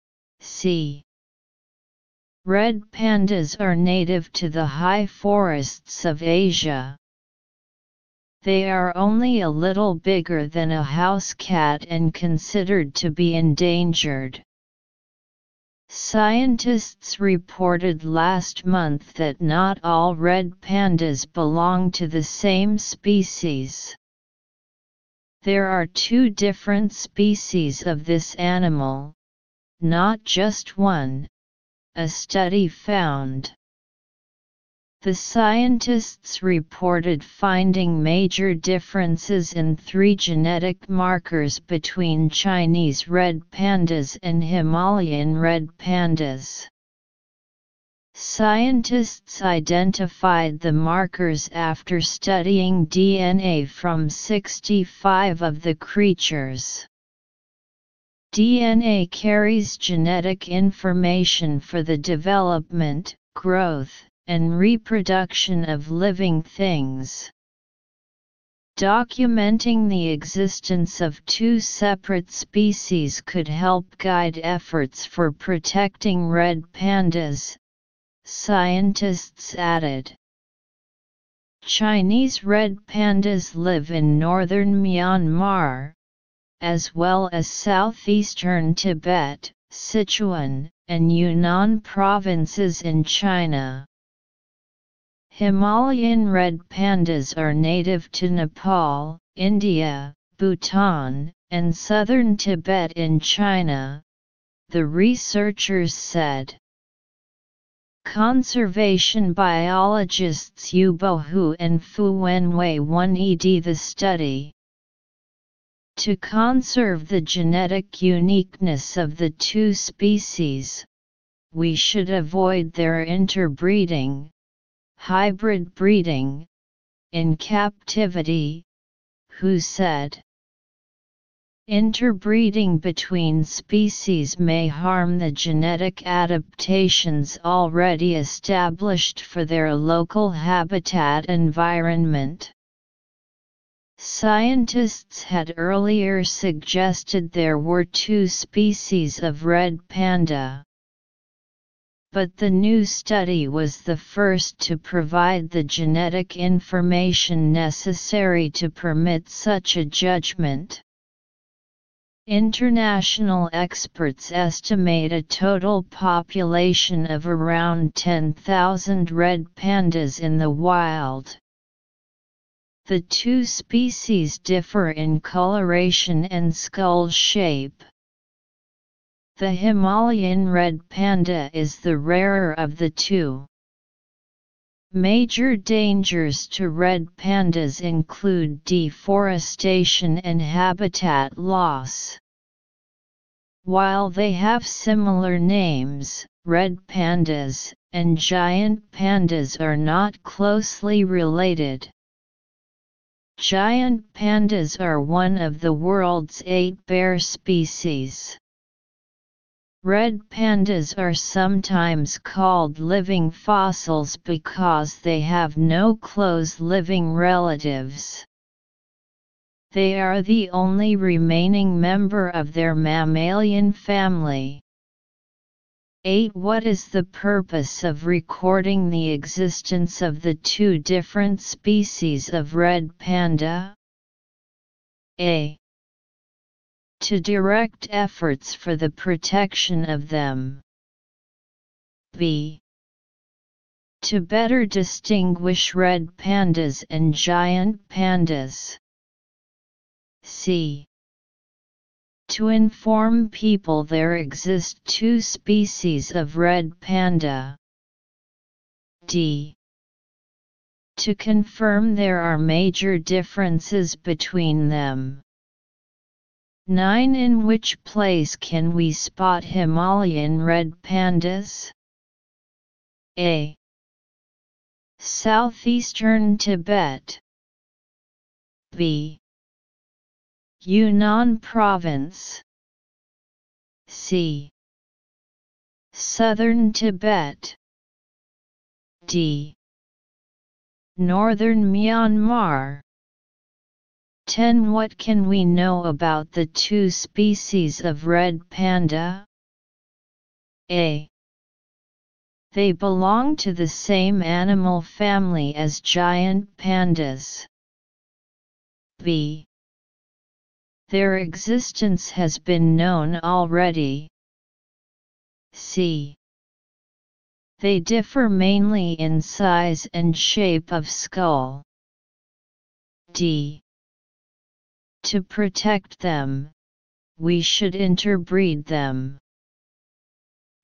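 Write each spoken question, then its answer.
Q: What is the purpose of recording the existence of the two different species of red panda?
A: A: To direct efforts for the protection of them.

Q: In which place can we spot Himalayan red pandas?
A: C: Southern Tibet.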